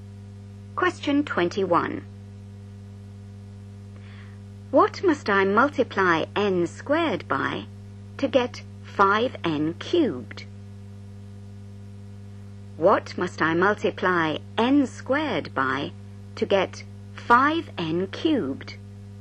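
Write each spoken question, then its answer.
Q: What must I multiply n squared by to get 5n cubed?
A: 5n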